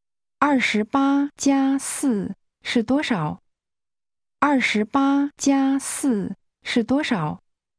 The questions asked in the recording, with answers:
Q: 28+4是多少?28+4是多少?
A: 32。32。